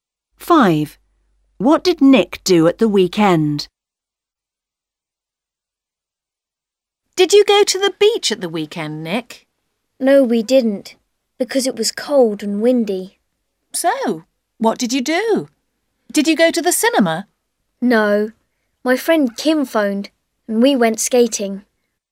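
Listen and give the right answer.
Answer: He went skating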